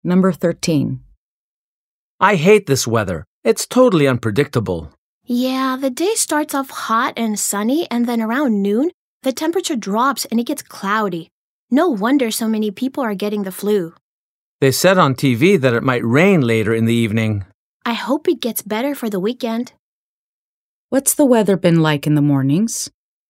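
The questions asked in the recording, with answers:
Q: What's the weather been like in the mornings?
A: Hot and sunny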